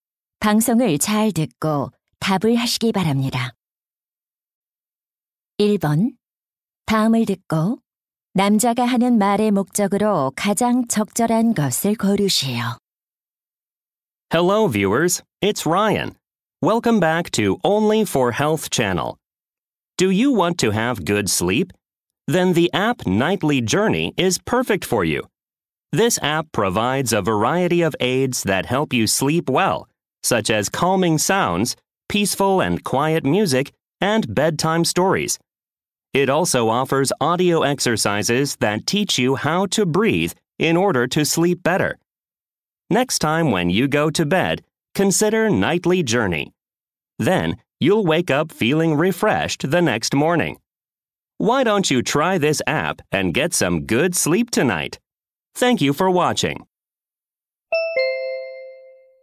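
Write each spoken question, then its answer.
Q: 다음을 듣고 남자가 하는 말의 목적으로 가장 적절한 것을 고르시오.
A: 수면 앱 Nightly Journey를 홍보하려고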